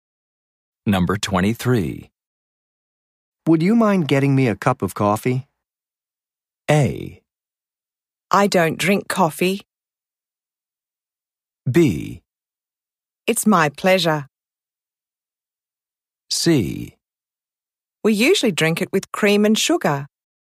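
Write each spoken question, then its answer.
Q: Would you mind getting me a cup of coffee?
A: B: It's my pleasure.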